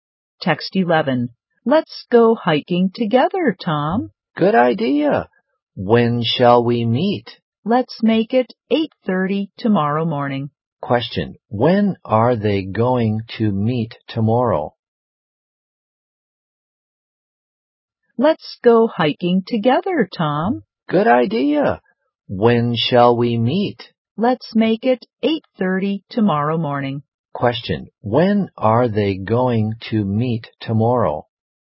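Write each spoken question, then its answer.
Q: When are they going to meet tomorrow?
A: At 8:30 tomorrow morning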